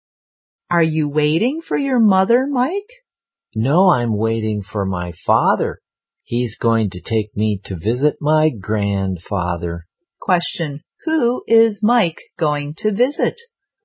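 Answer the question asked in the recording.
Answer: His grandfather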